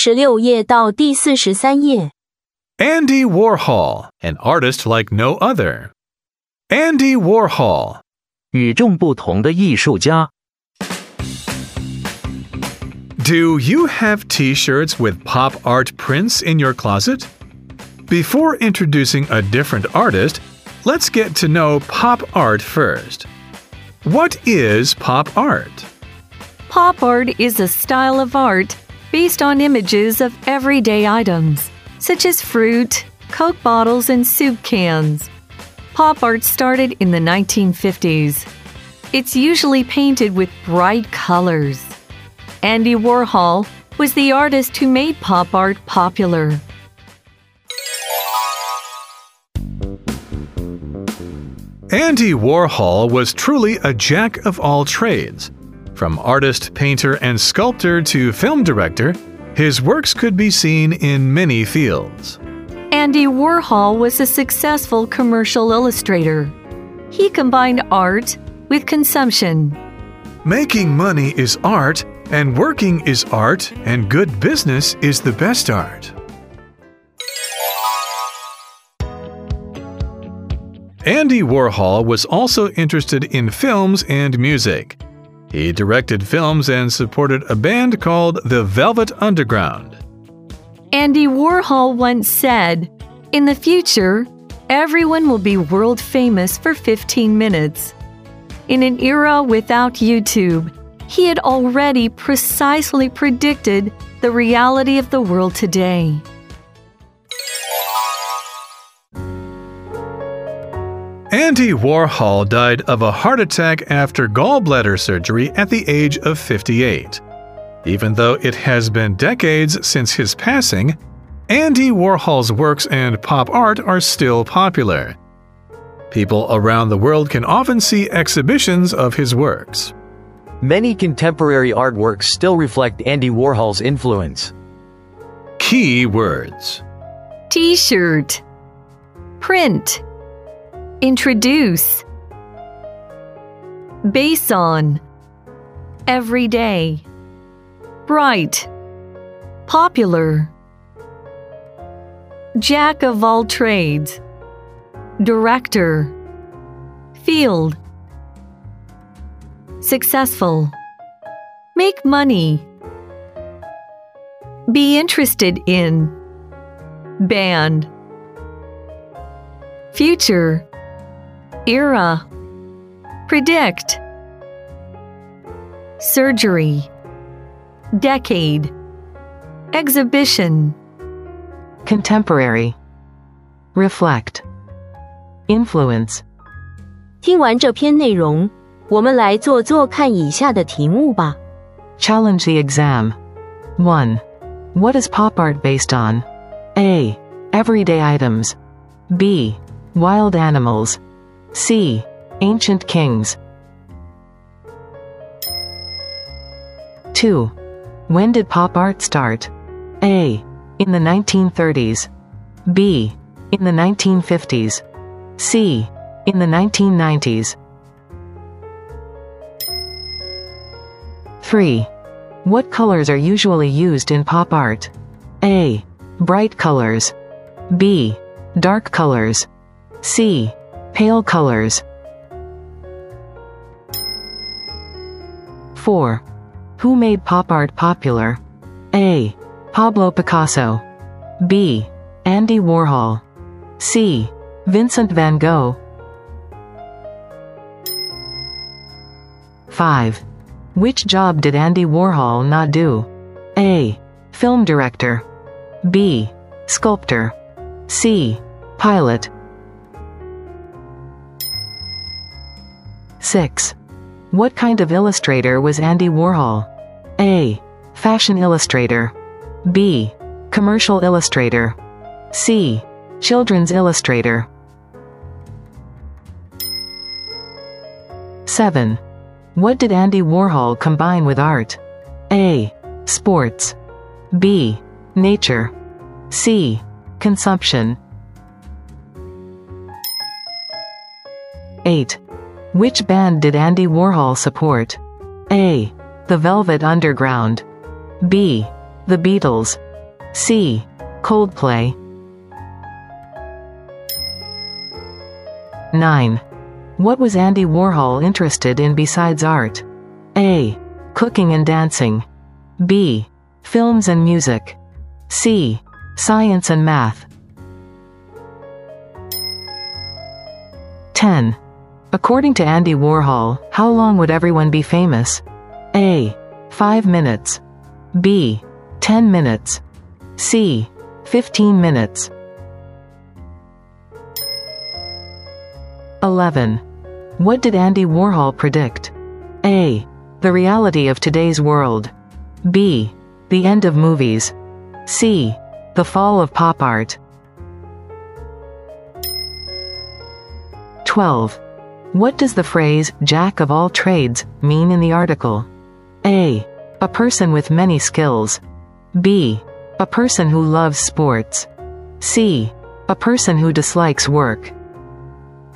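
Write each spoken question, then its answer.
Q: What is pop art based on?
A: A: Everyday items.

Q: When did pop art start?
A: B: In the 1950s.

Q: What colors are usually used in pop art?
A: A: Bright colors.

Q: Who made pop art popular?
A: B: Andy Warhol.

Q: Which job did Andy Warhol not do?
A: C: Pilot.

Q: What kind of illustrator was Andy Warhol?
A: B: Commercial illustrator.

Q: What did Andy Warhol combine with art?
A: C: Consumption.

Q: What was Andy Warhol interested in besides art?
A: B: Films and music.

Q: According to Andy Warhol, how long would everyone be famous?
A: C: 15 minutes.

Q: What did Andy Warhol predict?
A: A: The reality of today's world.

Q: What does the phrase "jack of all trades" mean in the article?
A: A: A person with many skills.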